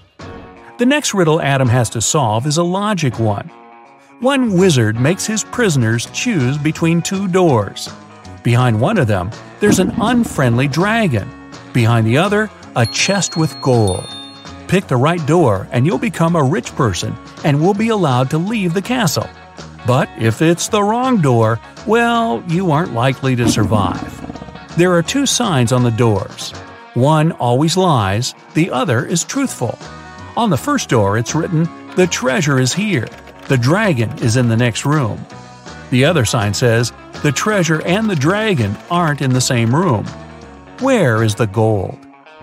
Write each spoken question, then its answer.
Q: Where is the gold?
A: The chest with the treasure is in the second room.